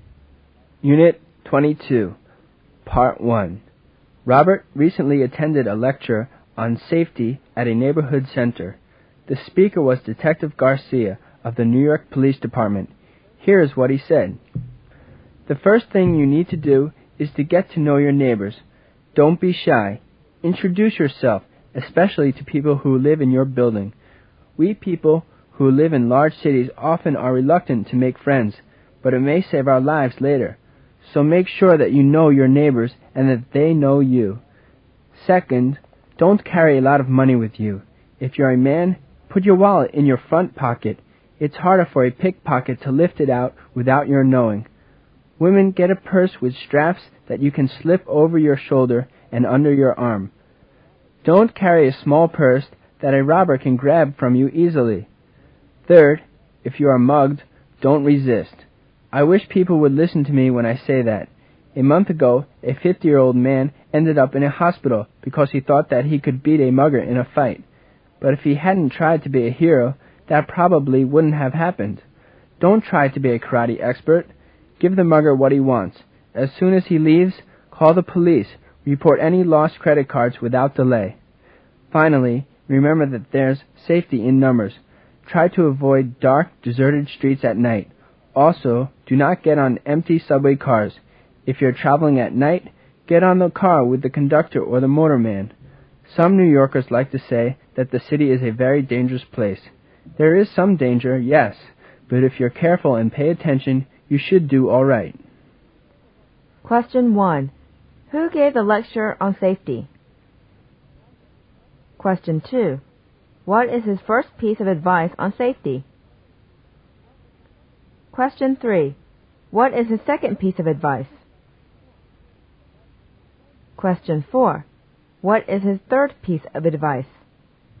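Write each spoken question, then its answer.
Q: Who gave the lecture on safety?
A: Detective Garcia of the New York Police Department

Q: What is his first piece of advice on safety?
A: Get to know your neighbors

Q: What is his second piece of advice?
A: Don't carry a lot of money with you

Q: What is his third piece of advice?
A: If you are mugged, don't resist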